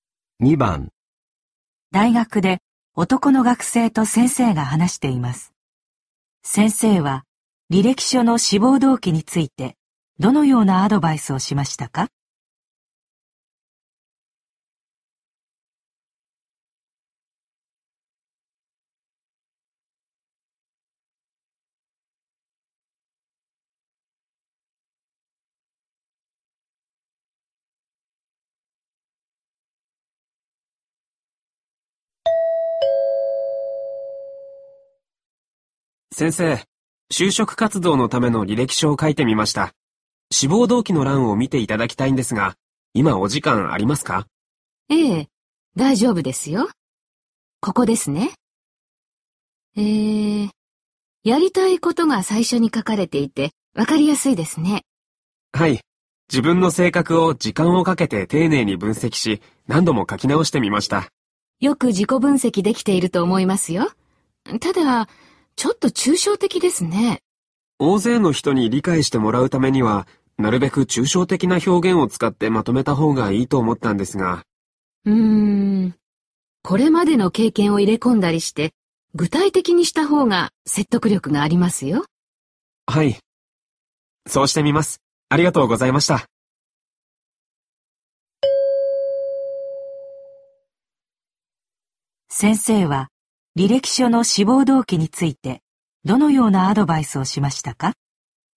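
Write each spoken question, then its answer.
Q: 先生は履歴書の志望動機についてどのようなアドバイスをしましたか?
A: 経験を入れて具体的に書いた方がいい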